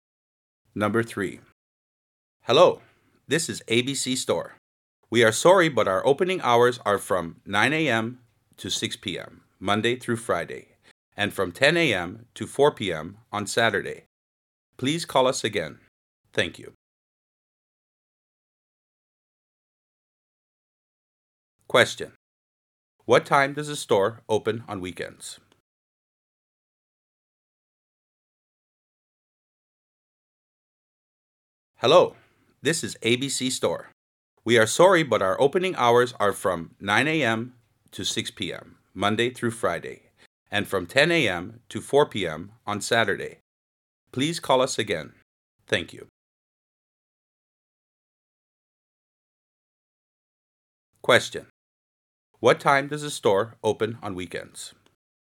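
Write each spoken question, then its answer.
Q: What time does the store open on weekends?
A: 10 a.m. on Saturday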